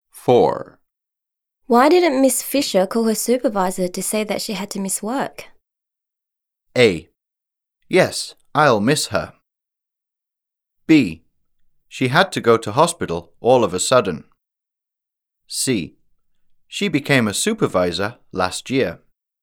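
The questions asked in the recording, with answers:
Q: Why didn't Miss Fisher call her supervisor to say that she had to miss work?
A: B: She had to go to hospital all of a sudden.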